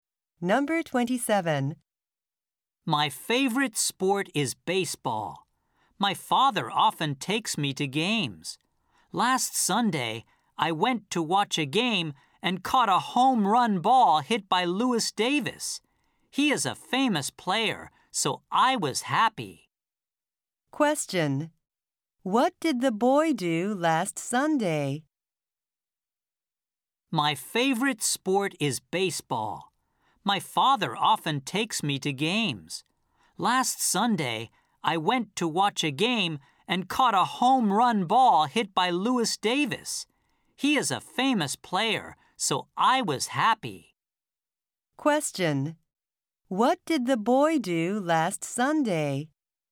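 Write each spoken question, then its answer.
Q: What did the boy do last Sunday?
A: He went to watch a baseball game and caught a home run ball.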